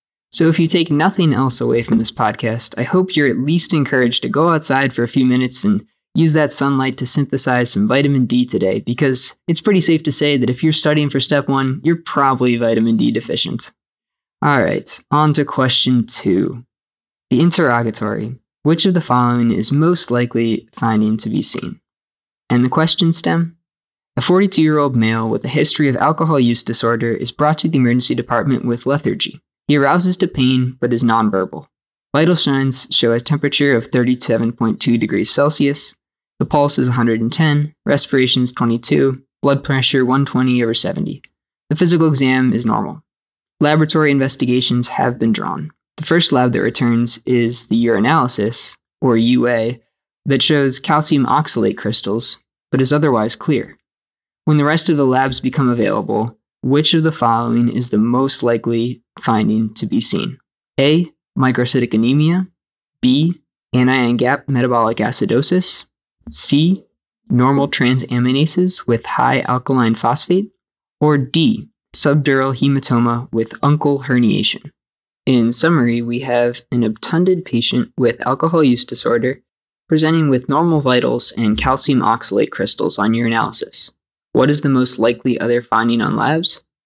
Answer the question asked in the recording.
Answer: The correct answer is B, anion gap metabolic acidosis.